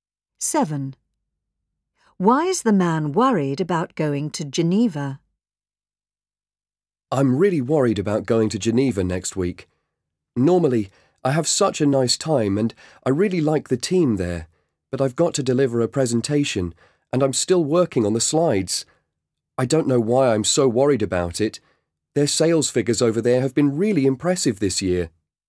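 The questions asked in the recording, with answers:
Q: Why is the man worried about going to Geneva?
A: He has to give a presentation and the slides aren't finished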